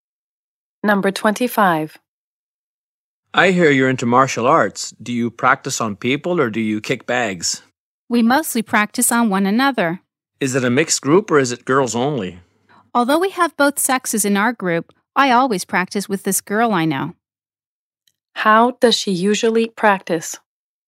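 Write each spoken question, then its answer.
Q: How does she usually practice?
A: With another girl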